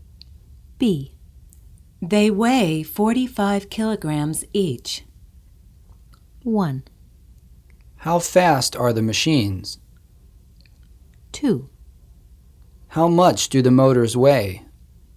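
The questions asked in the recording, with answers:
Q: How much do the motors weigh?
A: 2: How much do the motors weigh?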